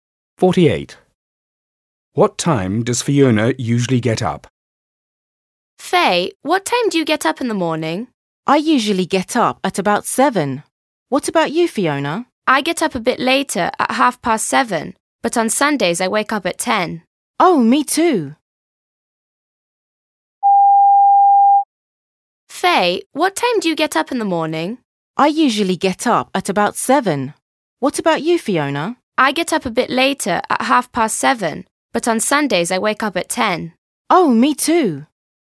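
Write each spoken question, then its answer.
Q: What time does Fiona usually get up?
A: At 7:30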